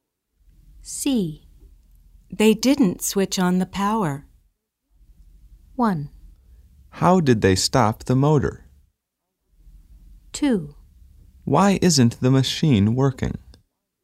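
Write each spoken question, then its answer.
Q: They didn't switch on the power.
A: 2: Why isn't the machine working?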